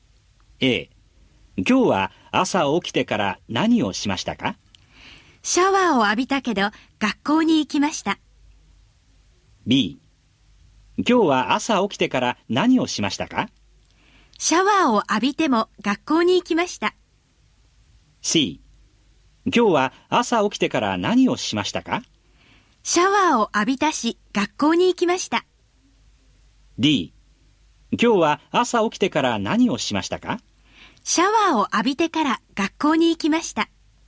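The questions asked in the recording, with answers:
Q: 今日は朝起きてから何をしましたか?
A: D: シャワーを浴びてから学校に行きました。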